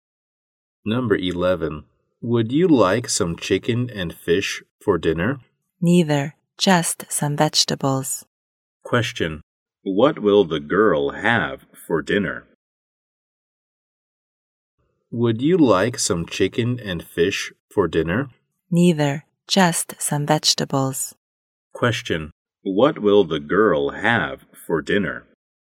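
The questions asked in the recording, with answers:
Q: What will the girl have for dinner?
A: Just some vegetables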